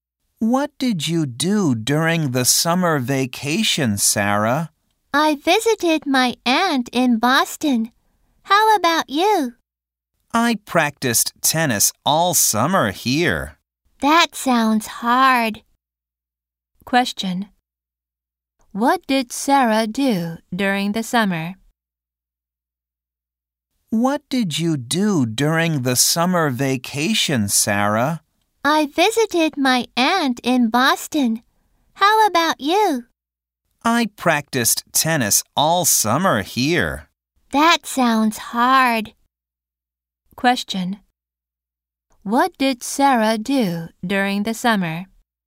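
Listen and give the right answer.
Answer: She visited her aunt in Boston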